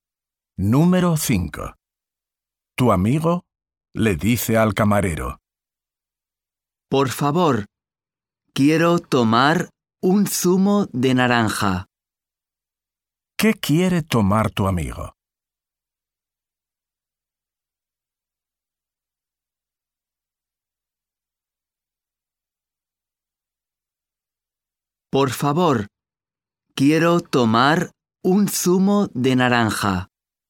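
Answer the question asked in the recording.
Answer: Un zumo de naranja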